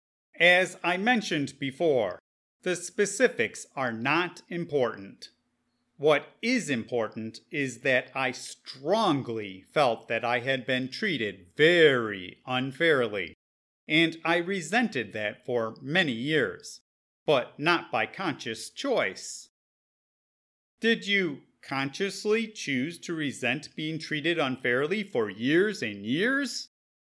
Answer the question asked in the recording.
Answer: No, I did resent for years after being treated unfairly, but not by choice.